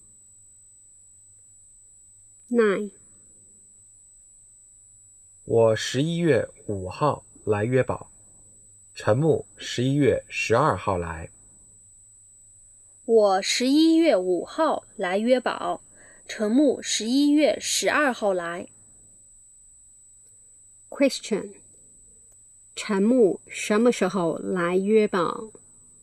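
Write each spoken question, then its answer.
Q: 陈木什么时候来约堡?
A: 11月12号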